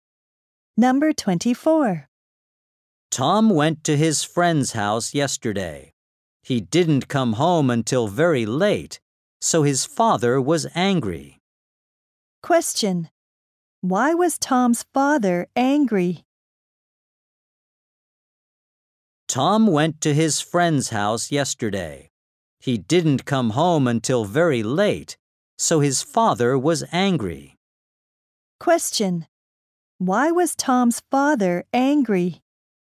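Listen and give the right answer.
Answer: Tom came home very late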